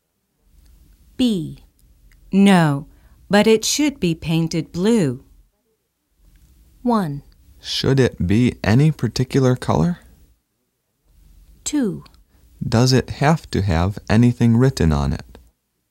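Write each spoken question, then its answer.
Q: No, but it should be painted blue.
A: 2: Does it have to have anything written on it?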